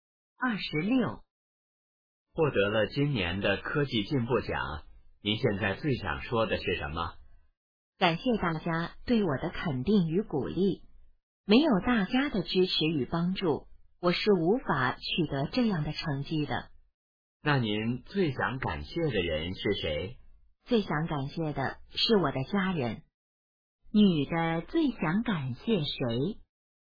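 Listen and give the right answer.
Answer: 她的家人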